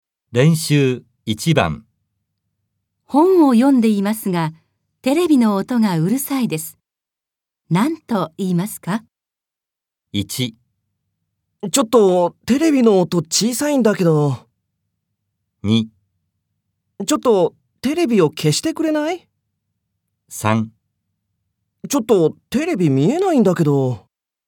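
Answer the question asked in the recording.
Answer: 2: ちょっとテレビを消してくれない?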